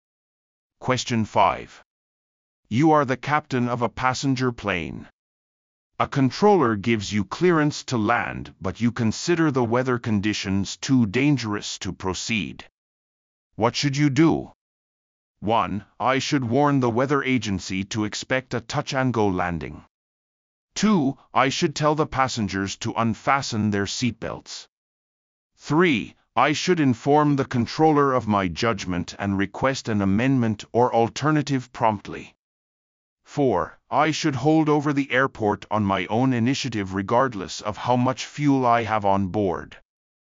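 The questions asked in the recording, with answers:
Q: What should you do?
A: 3: I should inform the controller of my judgment and request an amendment or alternative promptly.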